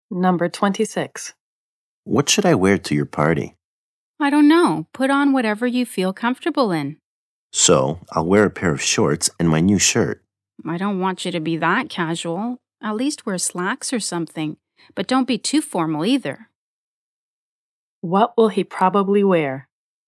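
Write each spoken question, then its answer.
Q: What will he probably wear?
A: Slacks, neither too casual nor too formal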